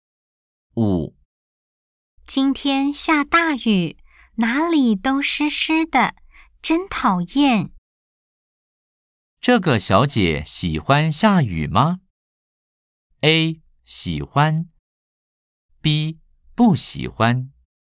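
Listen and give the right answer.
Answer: B: 不喜欢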